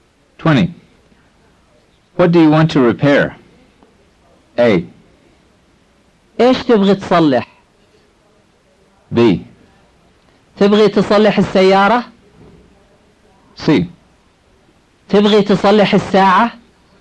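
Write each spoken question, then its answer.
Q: What do you want to repair?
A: A: ايش تبغي تصلح؟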